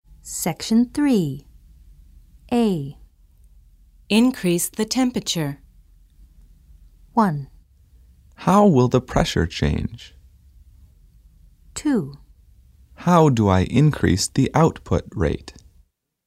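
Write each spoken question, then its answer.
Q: Increase the temperature.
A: 2: How do I increase the output rate?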